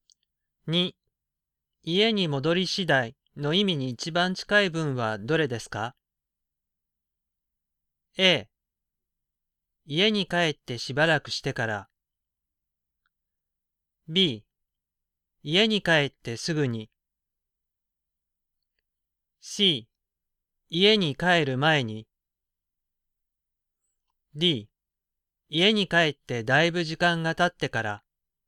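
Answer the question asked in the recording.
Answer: B: 家に帰ってすぐに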